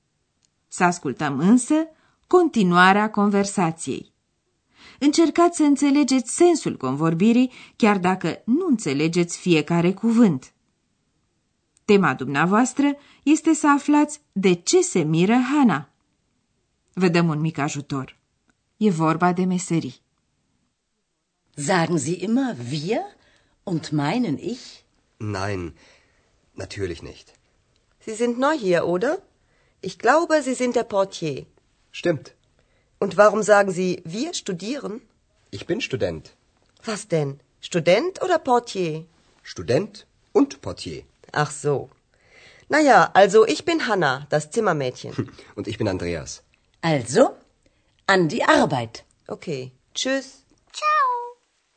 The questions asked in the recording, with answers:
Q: Tema dumneavoastră este să aflați de ce se miră Hana.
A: Hana se miră de faptul că Andreea spune că e student, deși mai înainte a admis că e portar.